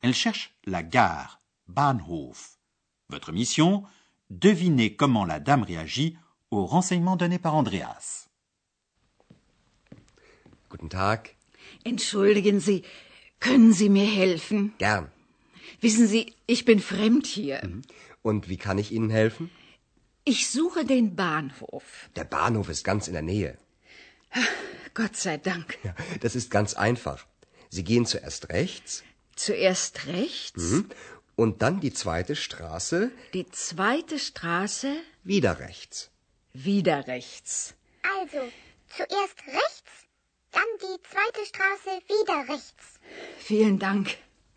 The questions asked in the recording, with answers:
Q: Devinez comment la dame réagit aux renseignements donnés par Andreas.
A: la vieille dame réagit en s'exclamant Dieu soit loué.